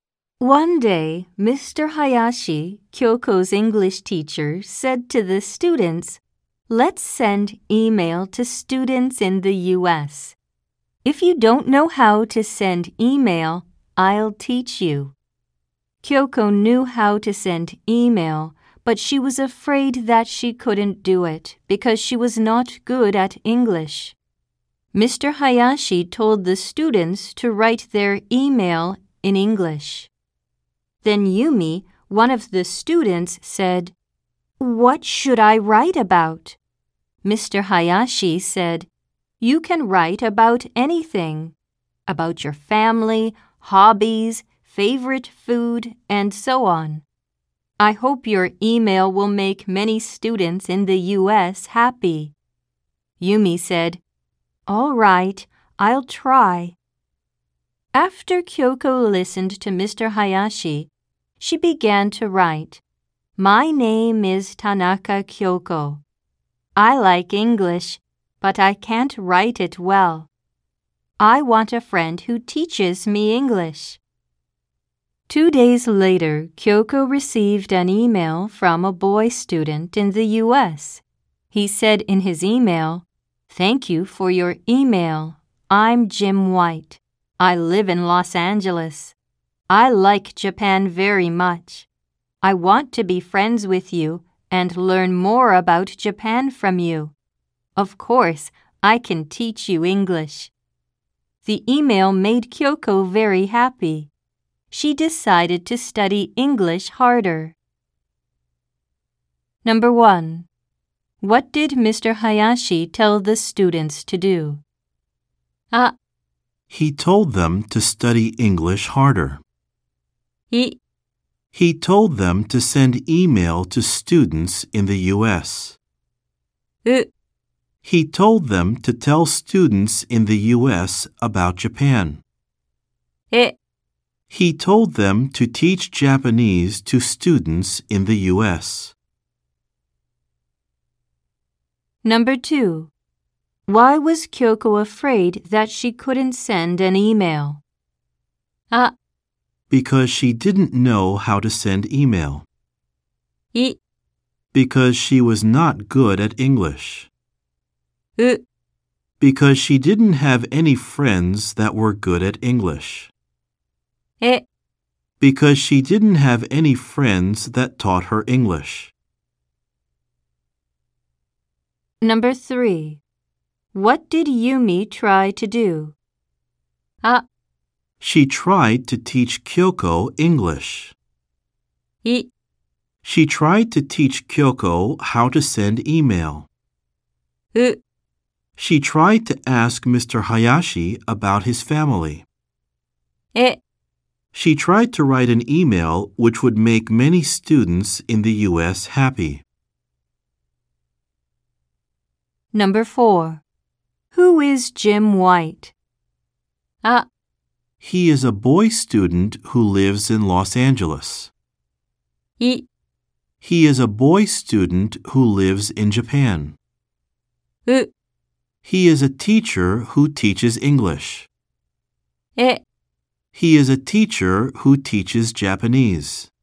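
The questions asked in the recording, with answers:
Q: What did Mr. Hayashi tell the students to do?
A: い: He told them to send email to students in the U.S.

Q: why was Kyoko afraid that she couldn't send an email?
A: い: Because she was not good at English.

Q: what did Yumi try to do?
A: え: She tried to write an email which would make many students in the U.S. happy.

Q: Who is Jim White?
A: あ: He is a boy student who lives in Los Angeles.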